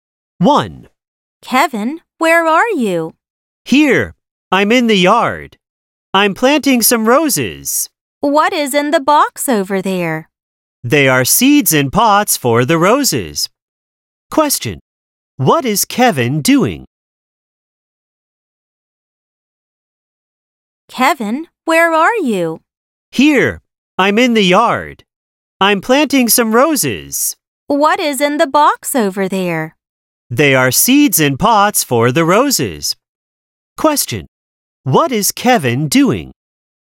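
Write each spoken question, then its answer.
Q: What is Kevin doing?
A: He is planting roses in the yard.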